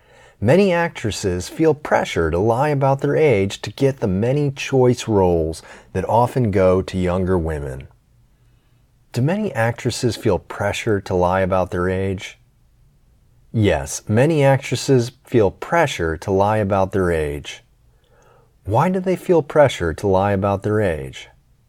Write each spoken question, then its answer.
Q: Why do they feel pressure to lie about their age?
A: They feel pressure to lie about their age to get the many choice roles that often go to younger women.